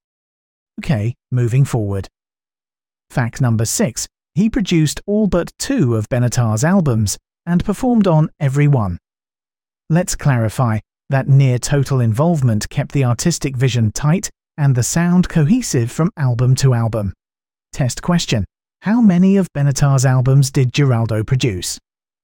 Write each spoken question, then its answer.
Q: How many of Benatar's albums did Giraldo produce?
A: Correct answer. All but 2.